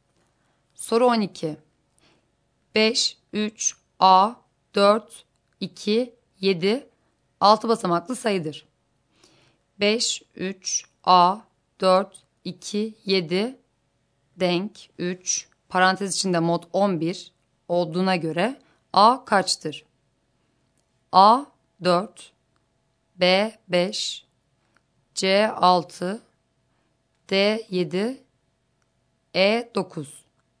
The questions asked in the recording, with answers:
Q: 5, 3, A, 4, 2, 7, denk 3, parantez içinde mod 11 olduğuna göre A kaçtır?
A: Doğru yanıt A şıkkı.